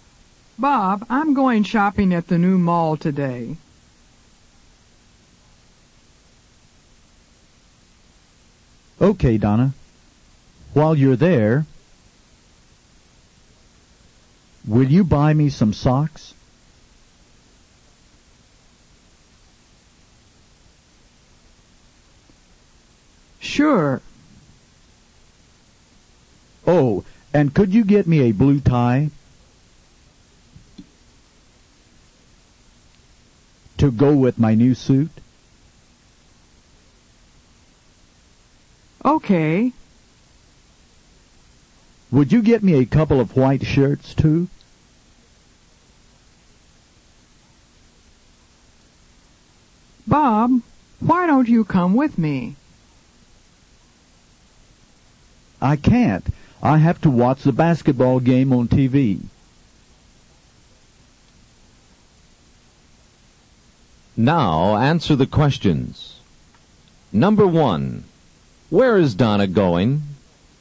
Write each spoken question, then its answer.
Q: Where is Donna going?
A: She's going shopping at the new mall.